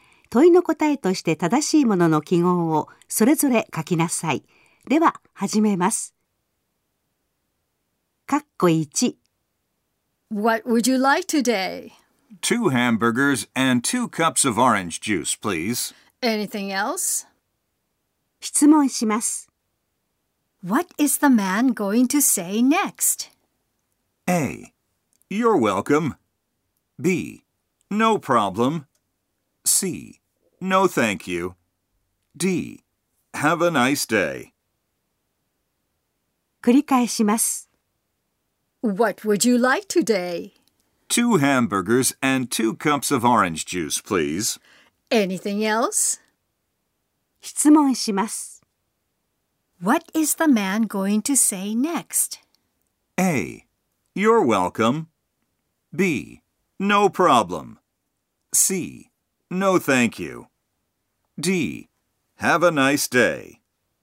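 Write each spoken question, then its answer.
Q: What is the man going to say next?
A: C: No thank you.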